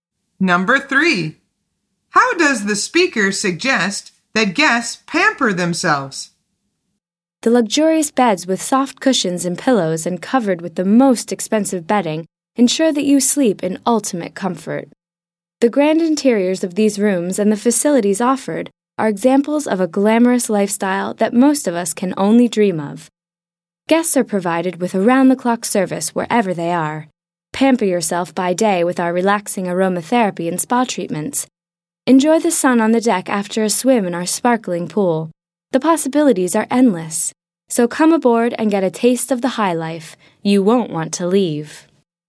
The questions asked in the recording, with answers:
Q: How does the speaker suggest that guests pamper themselves?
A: The answer is with relaxing aromatherapy and spa treatments.